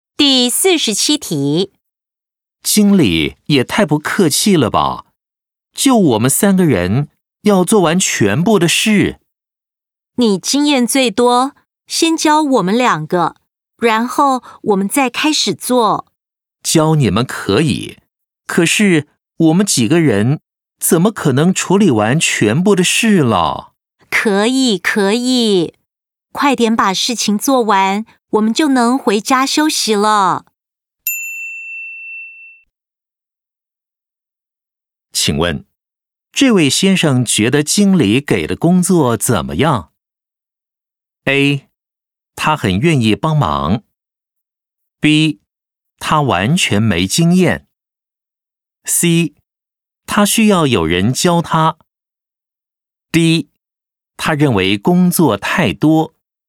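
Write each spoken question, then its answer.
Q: 请问,这位先生觉得经理给的工作怎么样?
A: D: 他认为工作太多。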